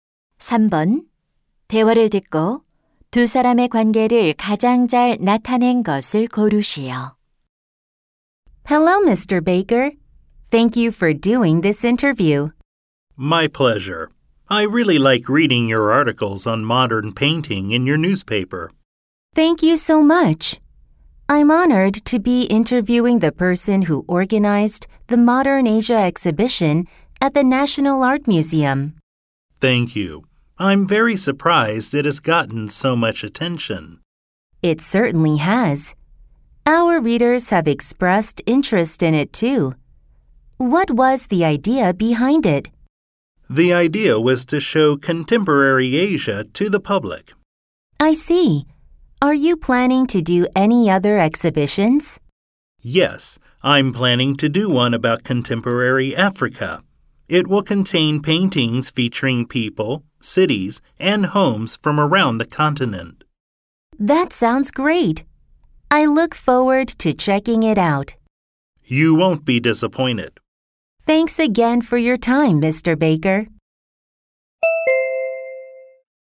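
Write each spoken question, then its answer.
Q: 대화를 듣고 두 사람의 관계를 가장 잘 나타낸 것을 고르시오.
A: 신문 기자 - 전시 기획자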